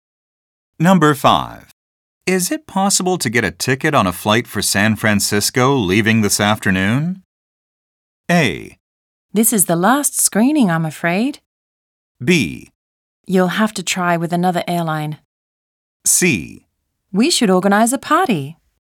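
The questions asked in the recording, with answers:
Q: Is it possible to get a ticket on a flight for San Francisco leaving this afternoon?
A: B: You'll have to try with another airline.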